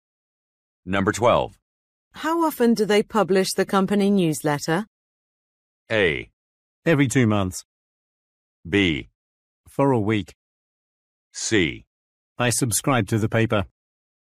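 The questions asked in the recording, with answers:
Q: How often do they publish the company newsletter?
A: A: Every 2 months.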